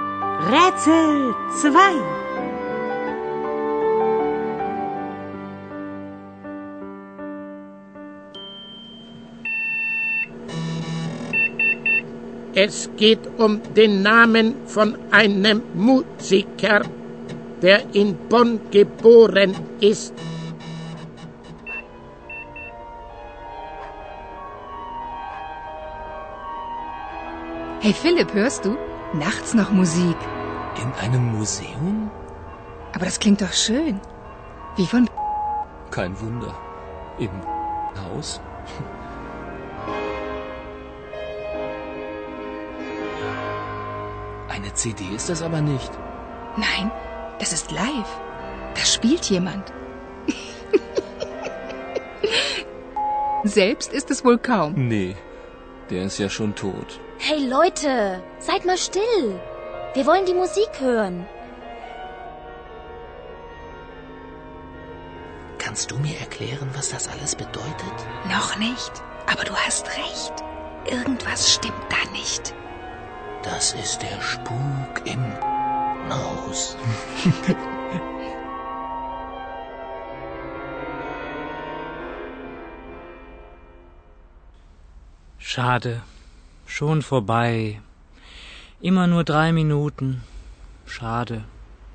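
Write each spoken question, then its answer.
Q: Es geht um den Namen von einem Musiker, der in Bonn geboren ist.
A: Beethoven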